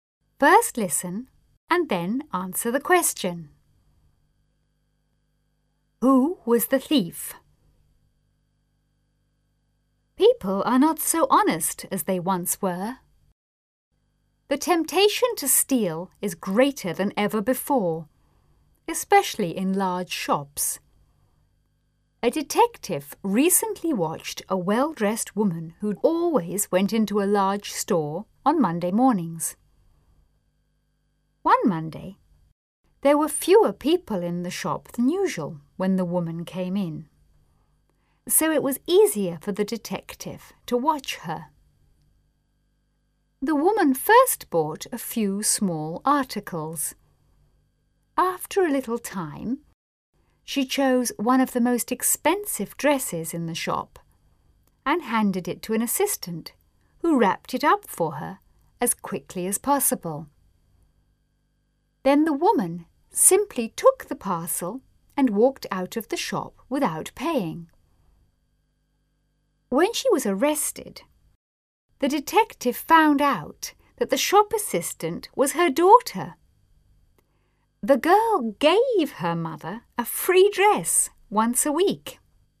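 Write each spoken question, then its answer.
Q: Who was the thief?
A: The shop assistant (the woman's daughter), along with her mother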